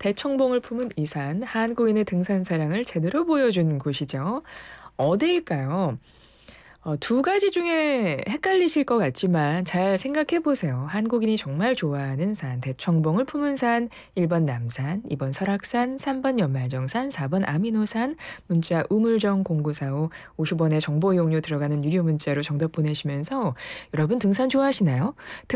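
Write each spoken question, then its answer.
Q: 한국인이 정말 좋아하는 산, 대청봉을 품은 산, 1번 남산, 2번 설악산, 3번 연말정산, 4번 아미노산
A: 2: 설악산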